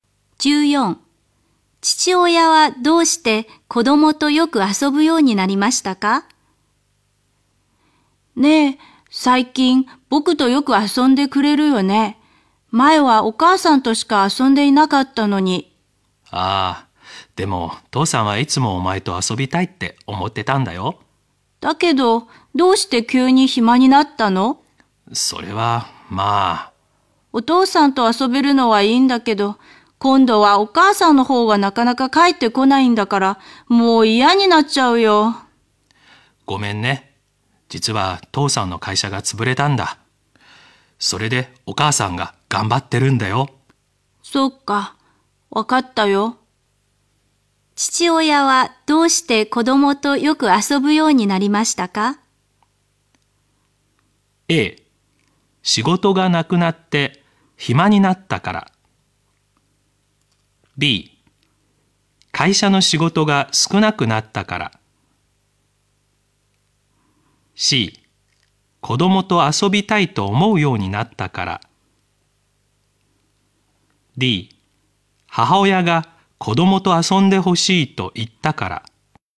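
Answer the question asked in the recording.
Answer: A: 仕事がなくなって暇になったから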